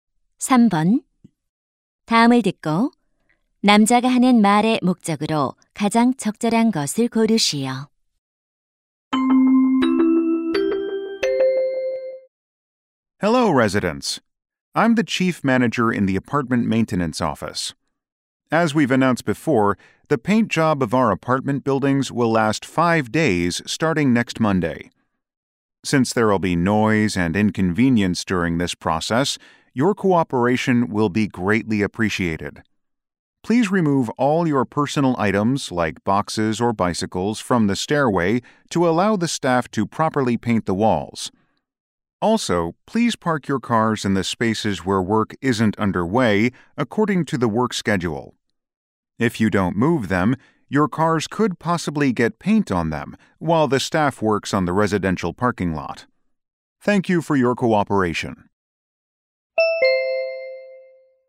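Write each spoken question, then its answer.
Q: 다음을 듣고 남자가 하는 말의 목적으로 가장 적절한 것을 고르시오.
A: 아파트 도색 작업에 대한 협조를 요청하려고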